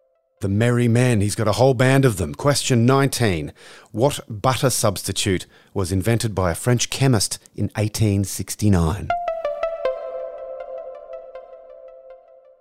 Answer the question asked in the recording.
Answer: Margarine.